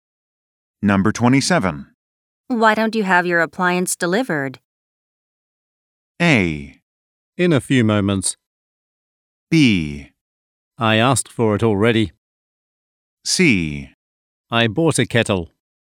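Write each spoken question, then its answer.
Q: Why don't you have your appliance delivered?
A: B: I asked for it already.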